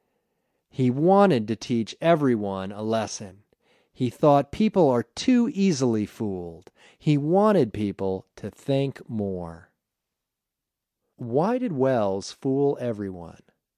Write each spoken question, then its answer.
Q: Why did Welles fool everyone?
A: He fooled everyone because he wanted them to think more.